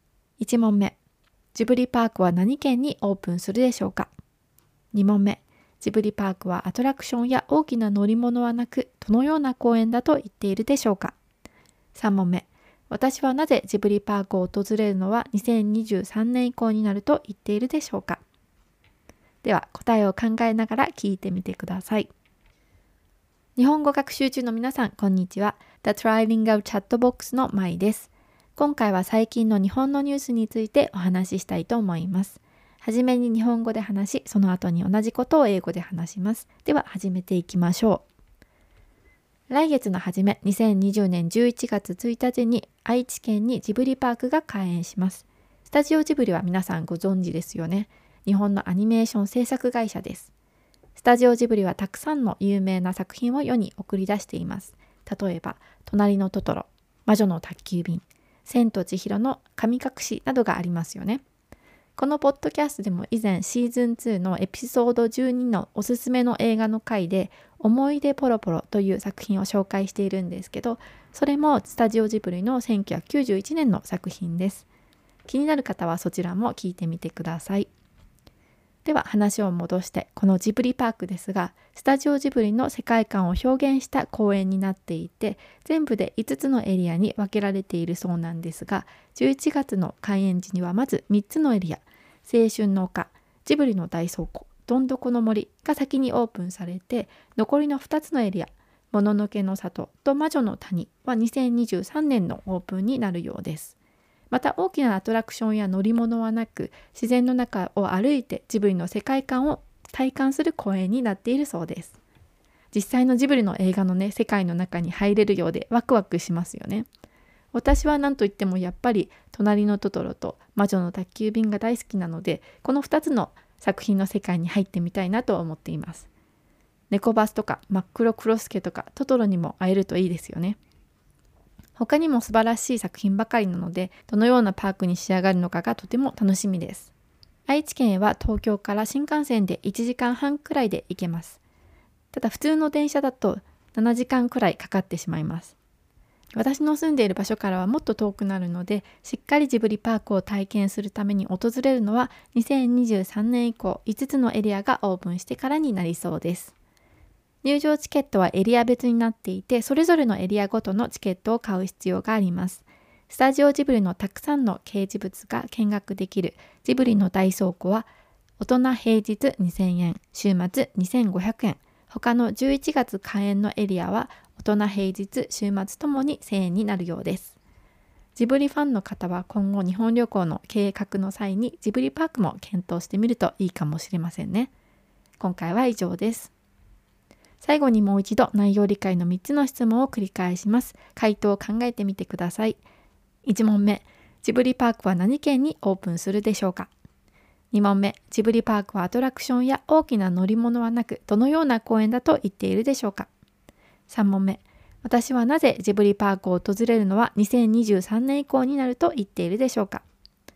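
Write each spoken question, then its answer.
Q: ジブリパークは何県にオープンするでしょうか?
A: 愛知県

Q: ジブリパークはアトラクションや大きな乗り物はなく、どのような公園だと言っているでしょうか。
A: 自然の中を歩いてジブリの世界観を体感する公園

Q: 私はなぜジブリパークを訪れるのは2023年以降になると言っているでしょうか。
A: 住んでいる場所が愛知県から遠いので、5つのエリアがすべてオープンしてからしっかり体験したいから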